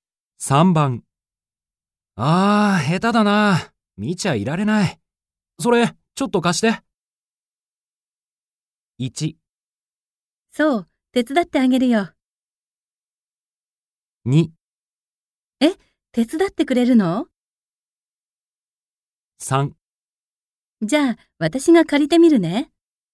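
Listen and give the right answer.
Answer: 2: え、手伝ってくれるの?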